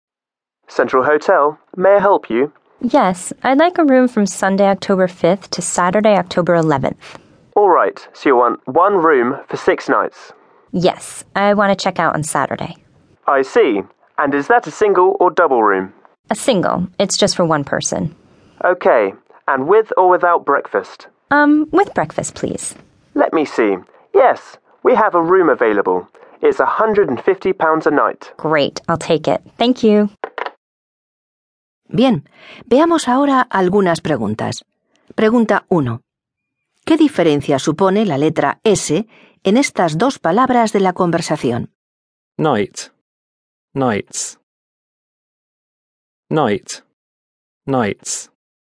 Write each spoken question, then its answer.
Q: ¿Qué diferencia supone la letra S en estas dos palabras de la conversación? Night. Nights.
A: La S cambia la palabra night al plural nights, que significa más de una noche.